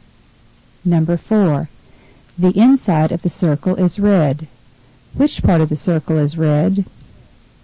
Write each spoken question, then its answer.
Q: Which part of the circle is red?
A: Number 4 is B, the inner part.